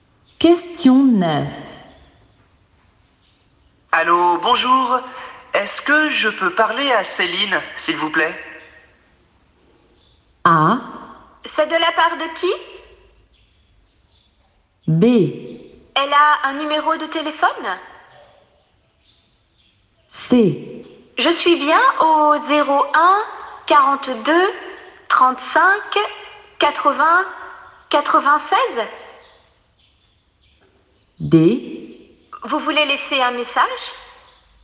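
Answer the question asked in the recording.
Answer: A: C'est de la part de qui?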